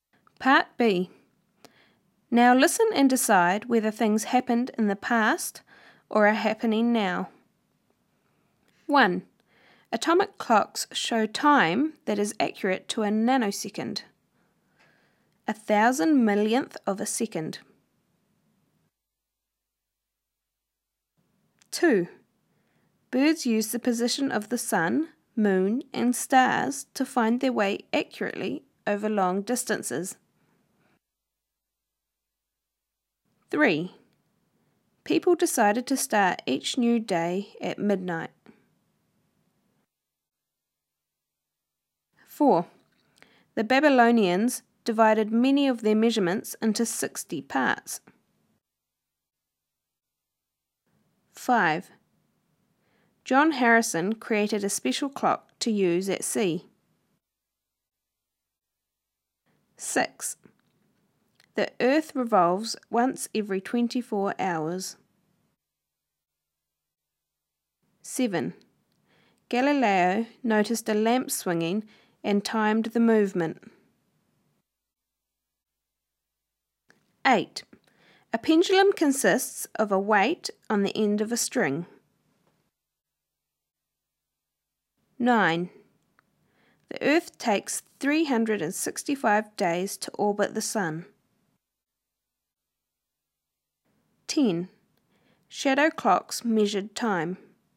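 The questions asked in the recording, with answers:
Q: Atomic clocks show time that is accurate to a nanosecond.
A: now

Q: Birds use the position of the sun, moon, and stars to find their way accurately over long distances.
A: now

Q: People decided to start each new day at midnight.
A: past

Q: The Babylonians divided many of their measurements into 60 parts.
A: past

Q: John Harrison created a special clock to use at sea.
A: past

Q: The Earth revolves once every 24 hours.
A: now

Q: Galileo noticed a lamp swinging and timed the movement.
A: past

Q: A pendulum consists of a weight on the end of a string.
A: now

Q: The Earth takes 365 days to orbit the Sun.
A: now

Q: Shadow clocks measured time.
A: past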